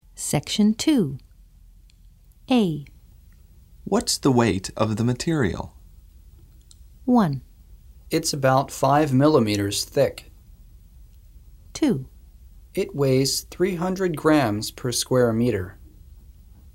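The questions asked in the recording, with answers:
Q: What's the weight of the material?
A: 2: It weighs 300 grams per square meter.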